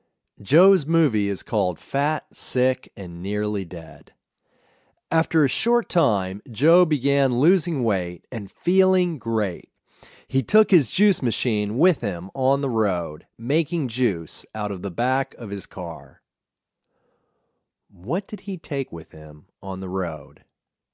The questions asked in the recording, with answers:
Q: What did he take with him on the road?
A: He took a juice machine with him on the road.